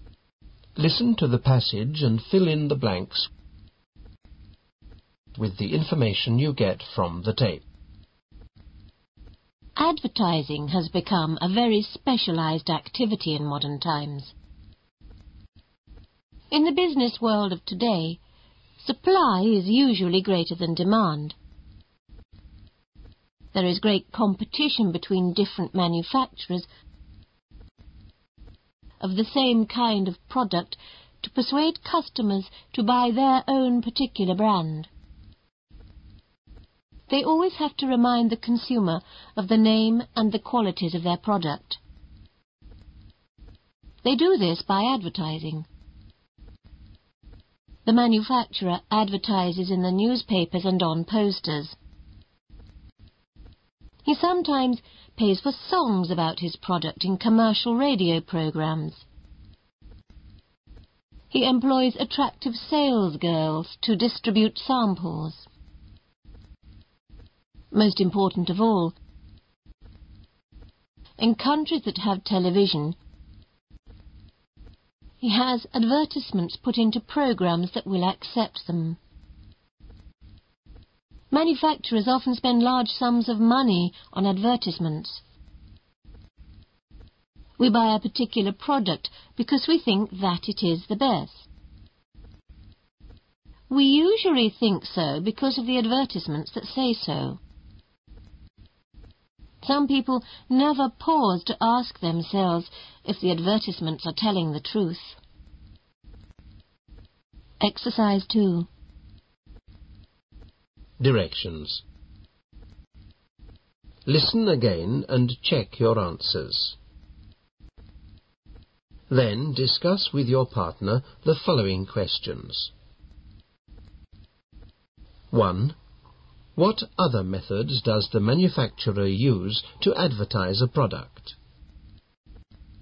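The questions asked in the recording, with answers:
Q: What other methods does the manufacturer use to advertise a product?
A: Newspapers, posters, paid songs in commercial radio programs, sales girls handing out samples, and TV advertisements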